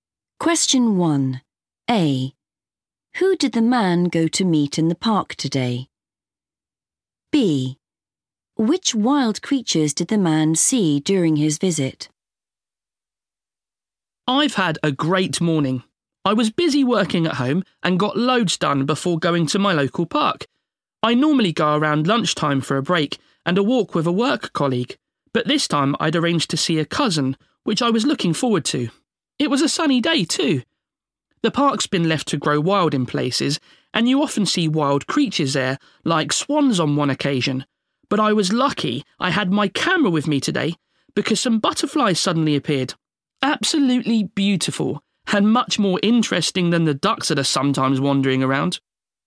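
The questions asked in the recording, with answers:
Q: Who did the man go to meet in the park today?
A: a cousin

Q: Which wild creatures did the man see during his visit?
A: butterflies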